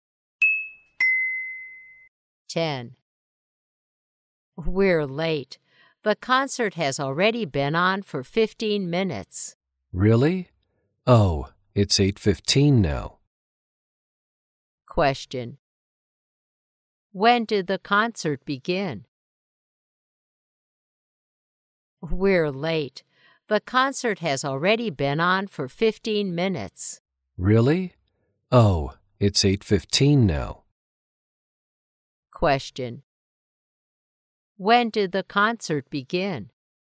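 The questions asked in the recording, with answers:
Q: When did the concert begin?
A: At 8:00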